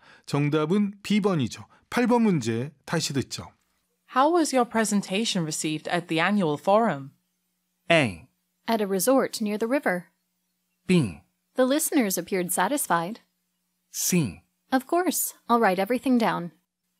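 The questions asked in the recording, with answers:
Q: How was your presentation received at the annual forum?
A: B: The listeners appeared satisfied.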